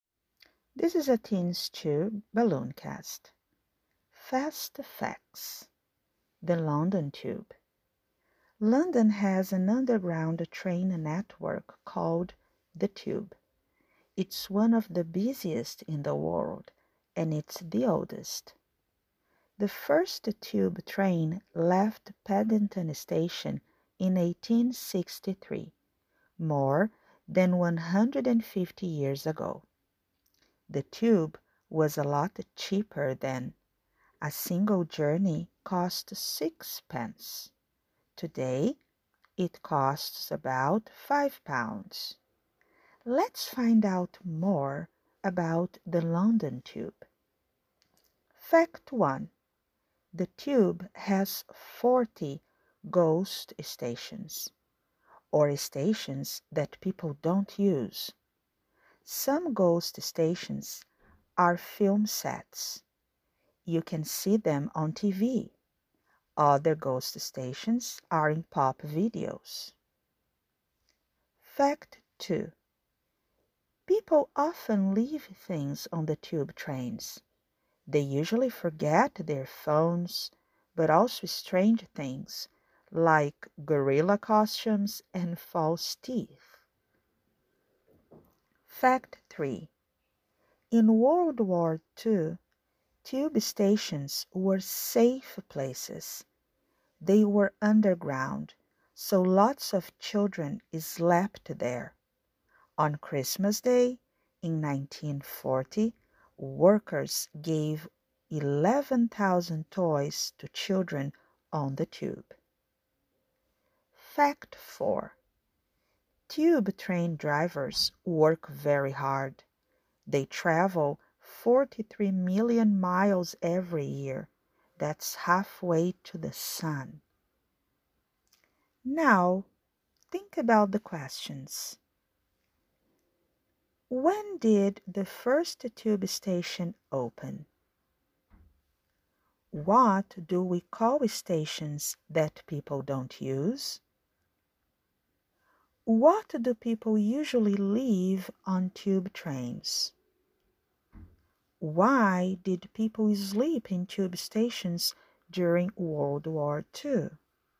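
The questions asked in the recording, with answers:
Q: When did the first tube station open?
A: In 1863

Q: What do we call stations that people don't use?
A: Ghost stations

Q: What do people usually leave on tube trains?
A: Their phones

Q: Why did people sleep in tube stations during World War II?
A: They were underground, so they were safe places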